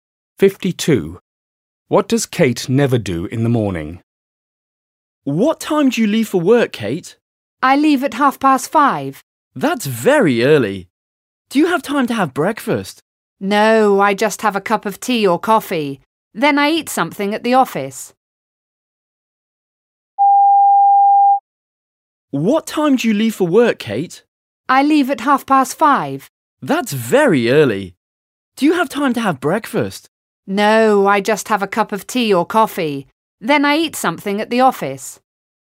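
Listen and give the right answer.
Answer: Have breakfast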